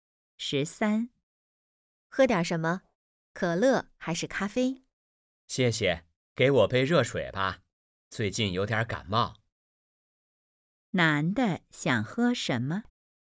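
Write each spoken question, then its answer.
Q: 男的想喝什么?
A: 热水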